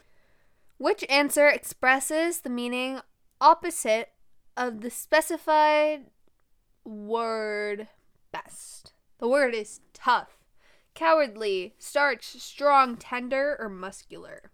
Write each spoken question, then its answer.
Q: Which answer expresses the meaning opposite of the specified word best?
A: Tender?